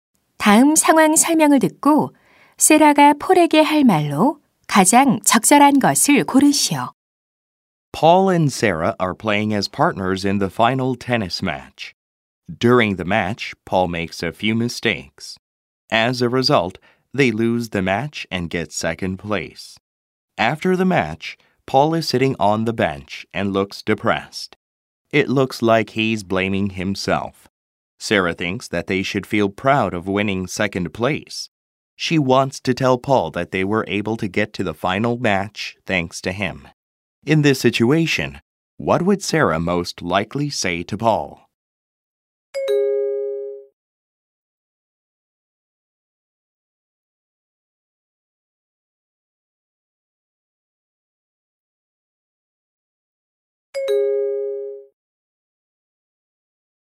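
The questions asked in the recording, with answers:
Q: In this situation, what would Sarah most likely say to Paul?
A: Don't blame yourself; we made it to the final thanks to you, so let's be proud of second place.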